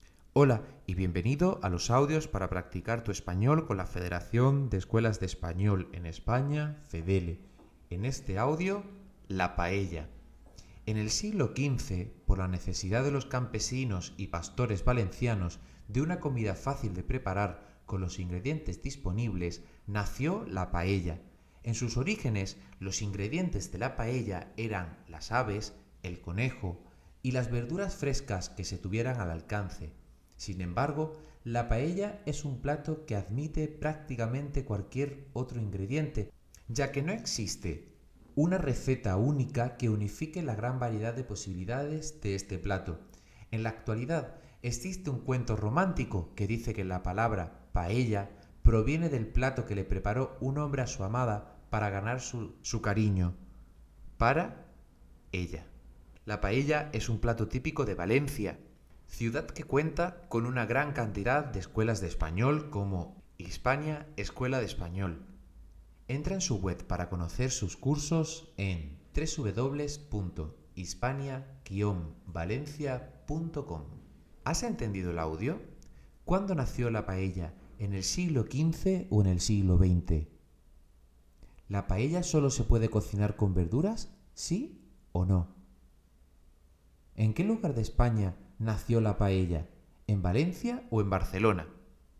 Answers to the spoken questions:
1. Correcto, la respuesta es en el siglo XV.
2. No, no se puede utilizar solamente verduras, necesitas al menos arroz.
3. Y es muy típica de Valencia.